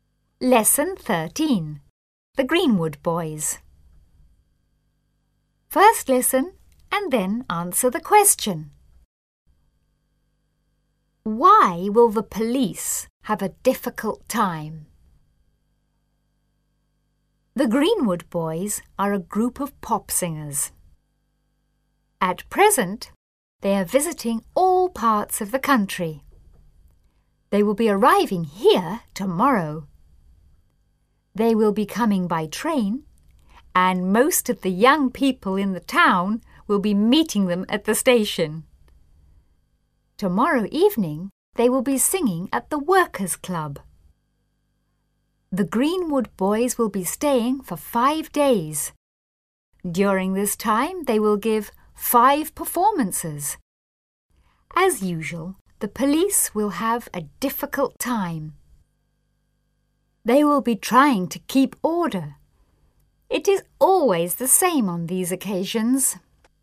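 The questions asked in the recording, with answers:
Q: Why will the police have a difficult time?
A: Because they will be trying to keep order when the Greenwood Boys visit.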